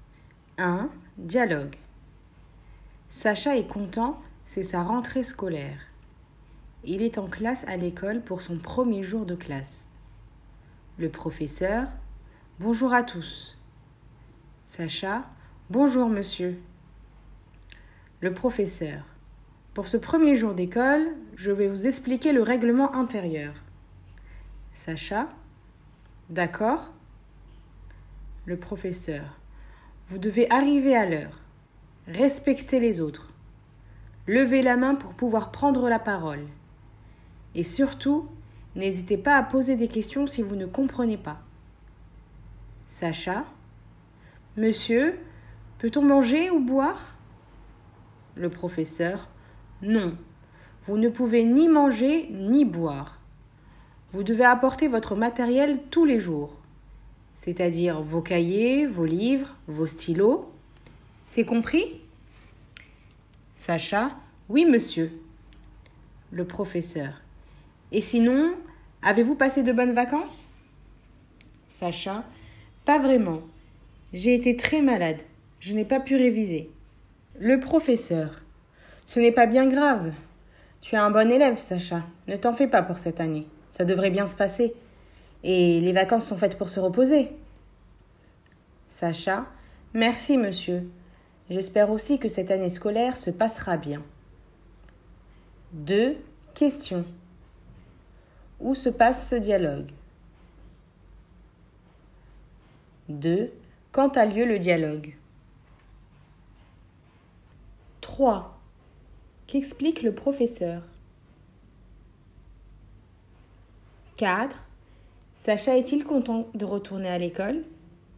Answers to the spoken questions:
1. 1. Il se passe en classe.
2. 2. Il a lieu le jour de la rentrée des classes.
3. 3. Il explique le règlement intérieur.
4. 4. Oui, Sacha est content.